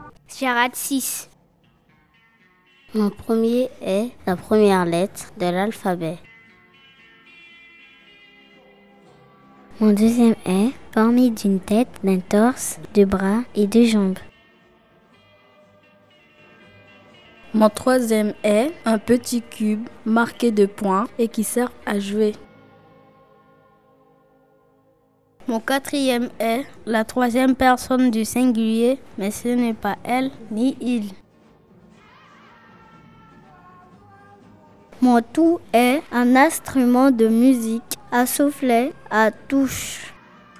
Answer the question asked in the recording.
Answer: La bonne réponse est l'accordéon.